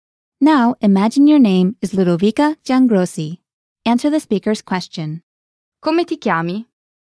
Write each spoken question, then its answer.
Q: Come ti chiami?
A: Mi chiamo Ludovica Giangrossi.